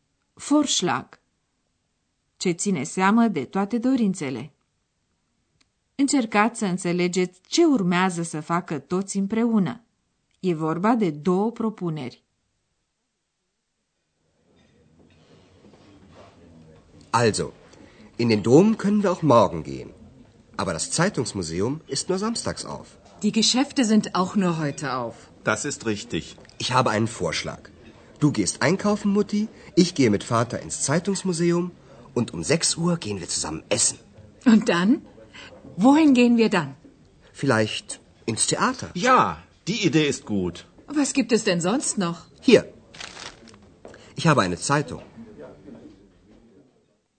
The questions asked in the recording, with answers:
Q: Încercați să înțelegeți ce urmează să facă toți împreună.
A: Andreas propune ca la ora 6 să ia împreună masa, iar după aceea să se ducă la teatru.